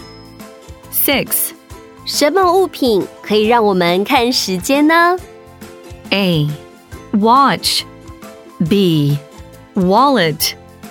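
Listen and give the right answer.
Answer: A: Watch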